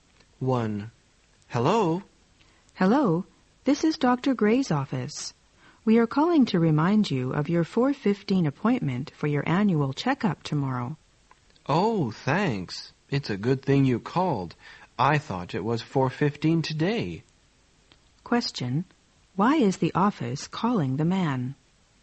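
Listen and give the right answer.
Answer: To remind him of his 4:15 checkup appointment tomorrow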